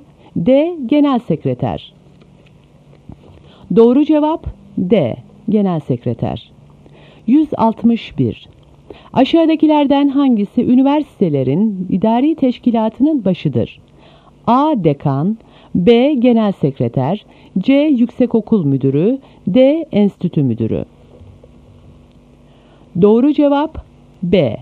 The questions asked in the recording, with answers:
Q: Aşağıdakilerden hangisi üniversitelerin idari teşkilatının başıdır?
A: Doğru cevap B. Genel Sekreter.